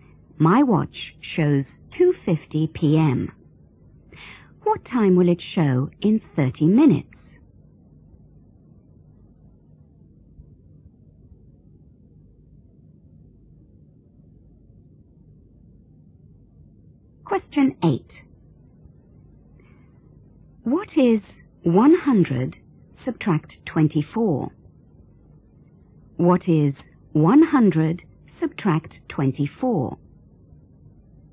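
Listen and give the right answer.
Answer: 76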